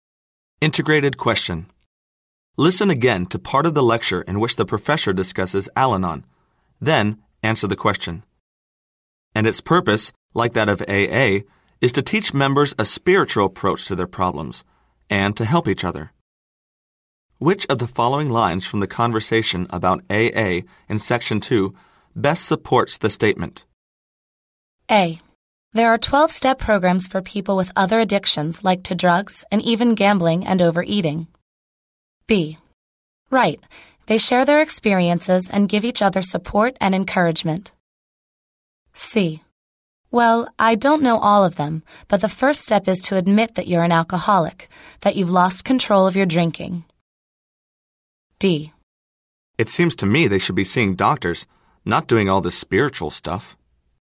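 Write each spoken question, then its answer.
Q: Which of the following lines from the conversation about AA in Section 2 best supports the statement?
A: B: Right. They share their experiences and give each other support and encouragement.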